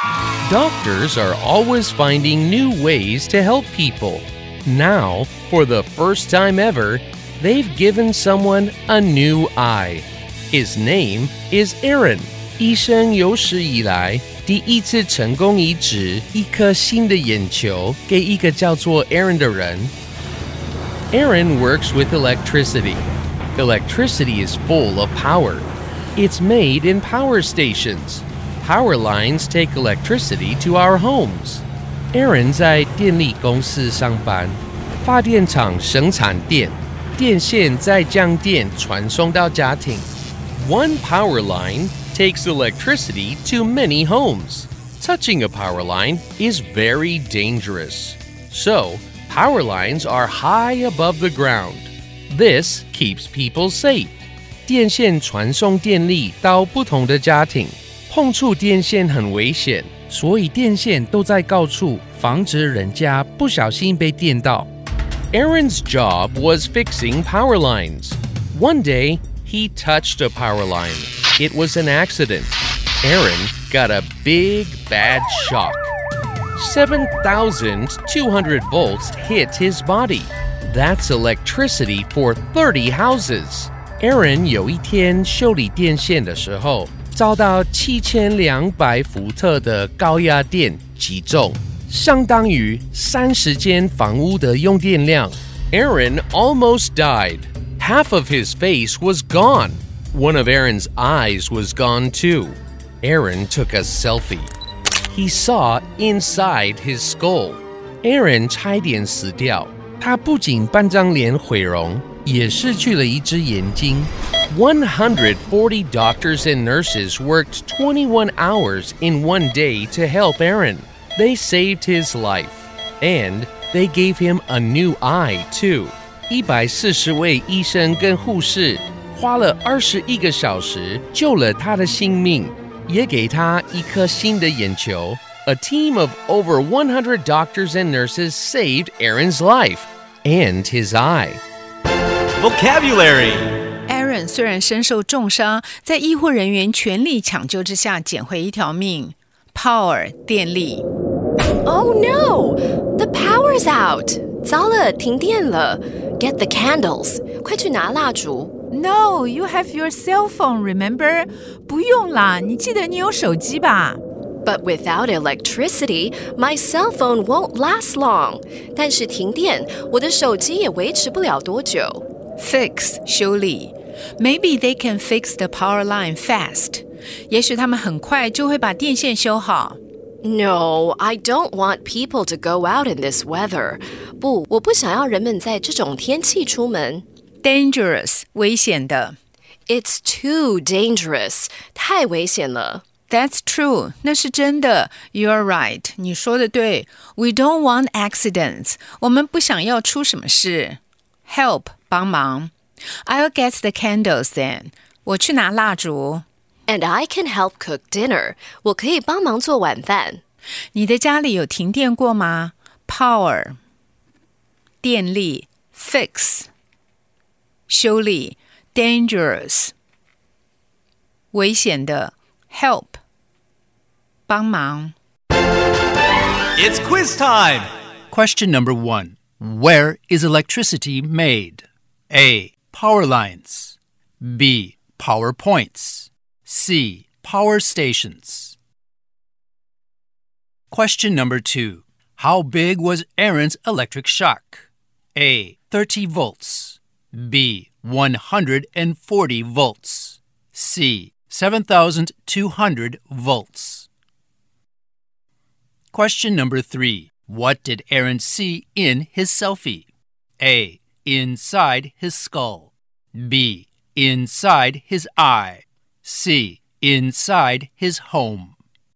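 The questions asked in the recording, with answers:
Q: Where is electricity made?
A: C: Power stations.

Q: How big was Aaron's electric shock?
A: C: 7,200 volts.

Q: What did Aaron see in his selfie?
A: A: Inside his skull.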